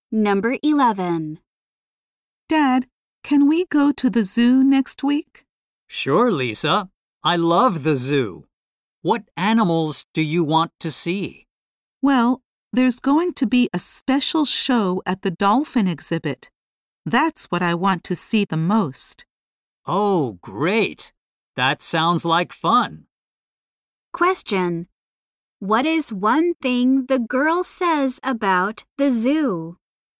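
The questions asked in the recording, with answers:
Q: What is one thing the girl says about the zoo?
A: There will be a special show at the dolphin exhibit.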